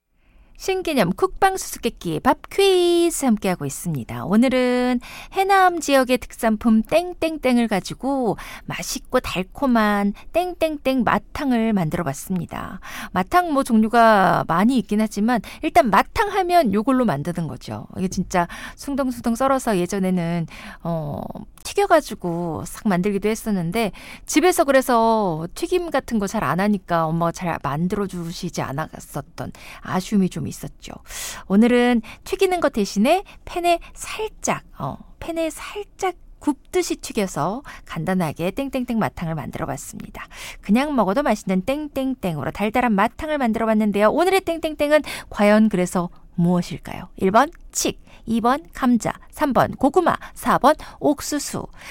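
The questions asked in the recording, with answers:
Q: 오늘의 땡땡땡은 과연 그래서 무엇일까요? 1번 칡, 2번 감자, 3번 고구마, 4번 옥수수.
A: 3번: 고구마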